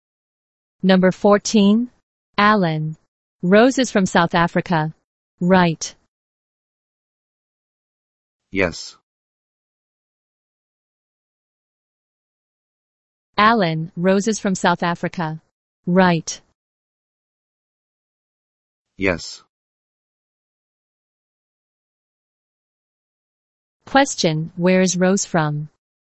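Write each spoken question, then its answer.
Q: Question, where is Rose from?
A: South Africa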